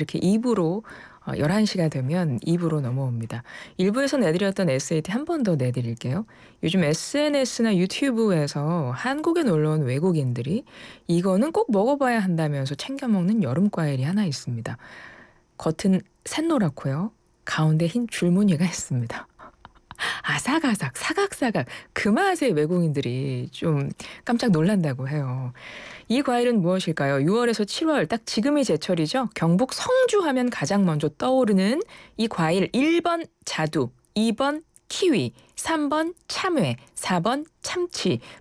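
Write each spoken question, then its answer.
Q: 이 과일은 무엇일까요?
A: 3번: 참외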